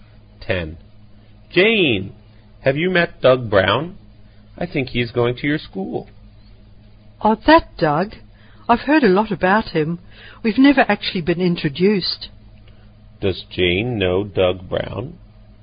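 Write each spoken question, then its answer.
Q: Does Jane know Doug Brown?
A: No, she has only heard a lot about him; they've never been introduced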